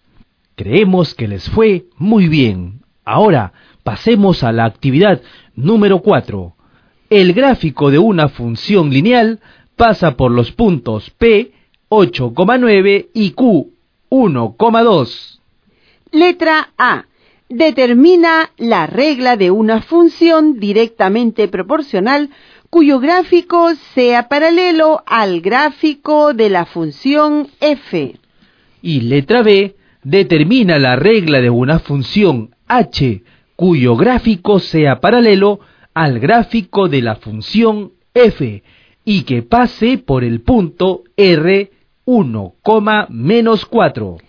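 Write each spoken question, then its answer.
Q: Letra A. Determina la regla de una función directamente proporcional cuyo gráfico sea paralelo al gráfico de la función f.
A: f(x) = x

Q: Y letra B, determina la regla de una función h, cuyo gráfico sea paralelo al gráfico de la función f, y que pase por el punto r, 1, -4.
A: h(x) = x - 5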